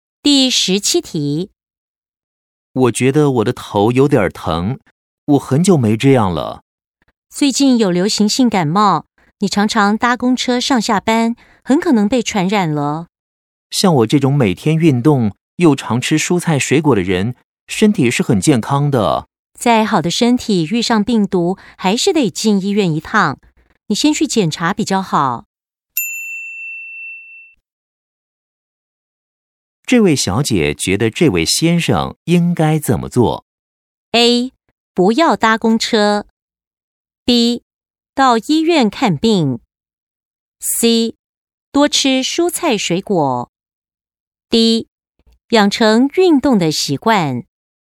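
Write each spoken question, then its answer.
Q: 这位小姐觉得这位先生应该怎么做?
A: B: 到医院看病。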